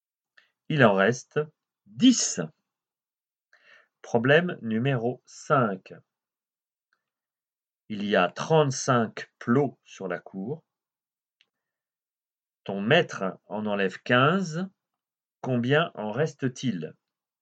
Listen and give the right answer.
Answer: Il en reste 20.